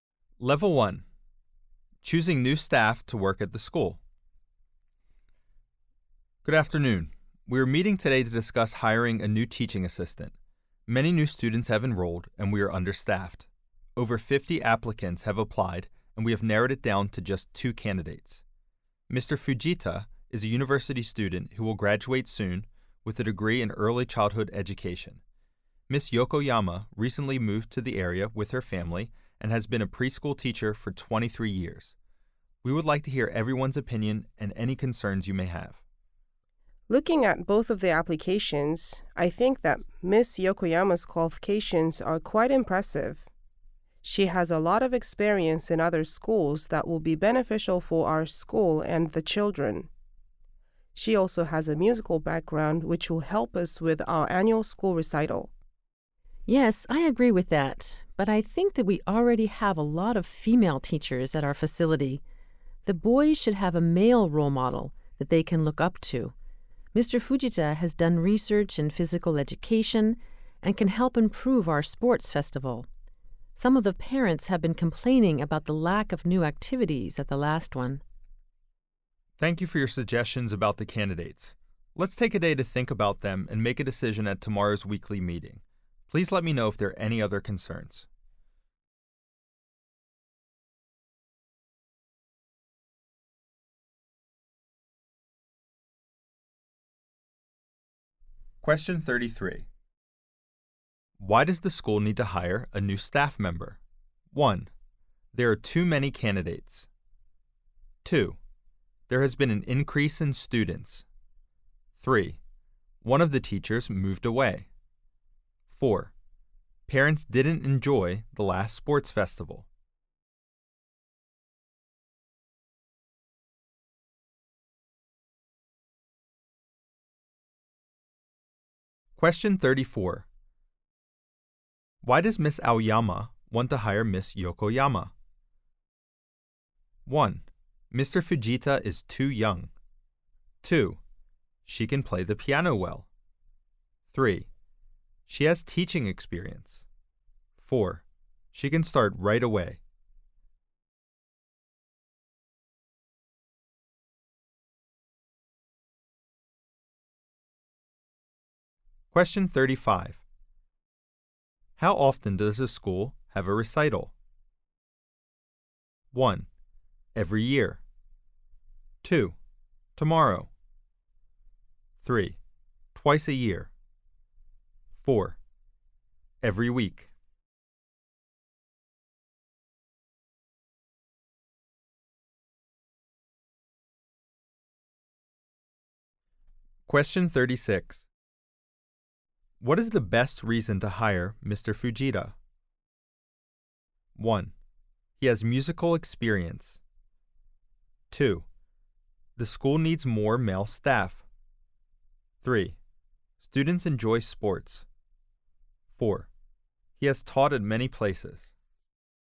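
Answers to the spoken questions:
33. 2: There has been an increase in students.
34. 3: She has teaching experience.
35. 1: Every year.
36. 2: The school needs more male staff.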